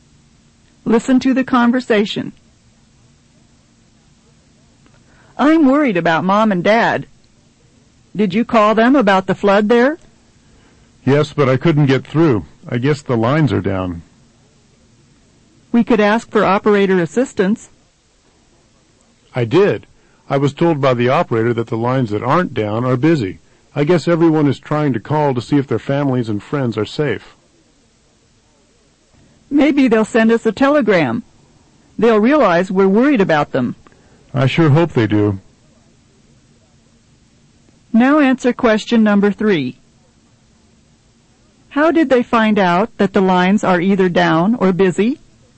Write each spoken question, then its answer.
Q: How did they find out that the lines are either down or busy?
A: the phone operator told them when they asked for assistance.